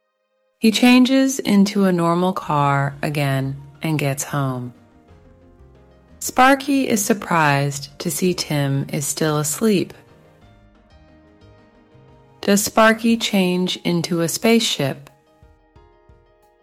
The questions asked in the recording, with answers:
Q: Does Sparky change into a spaceship?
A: No, he doesn't.